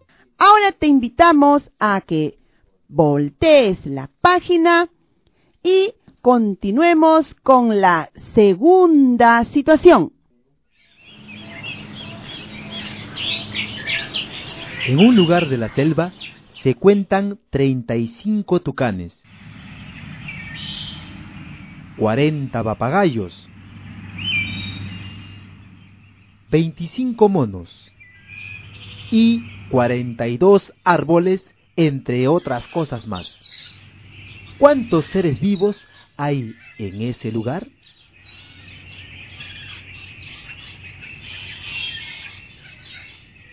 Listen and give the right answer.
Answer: En ese lugar hay 142 seres vivos.